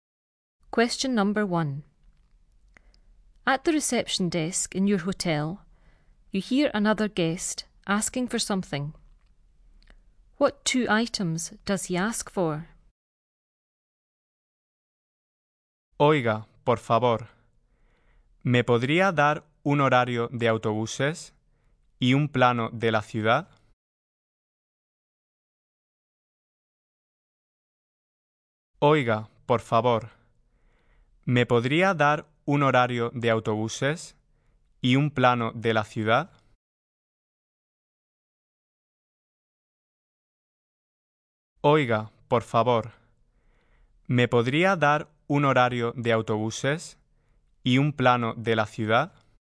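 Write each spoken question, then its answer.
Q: What two items does he ask for?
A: A bus timetable and a map of the town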